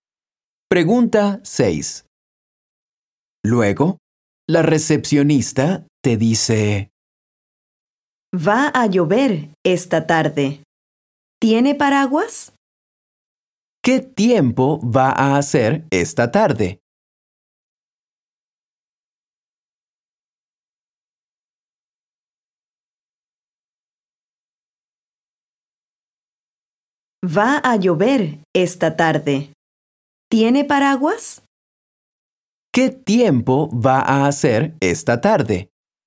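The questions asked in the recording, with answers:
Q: ¿Qué tiempo va a hacer esta tarde?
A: va a llover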